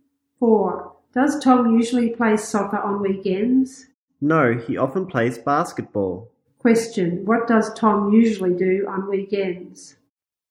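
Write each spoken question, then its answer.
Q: What does Tom usually do on weekends?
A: He plays basketball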